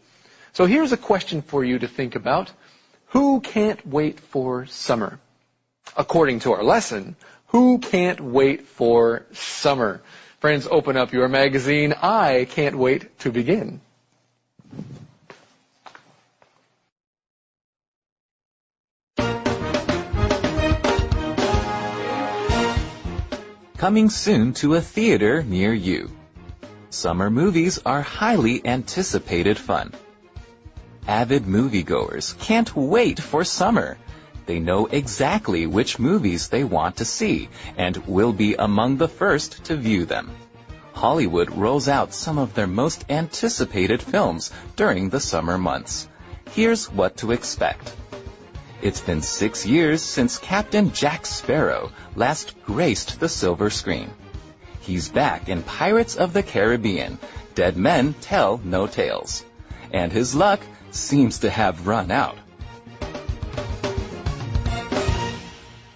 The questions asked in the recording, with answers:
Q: According to our lesson, who can't wait for summer?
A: Of course, avid moviegoers.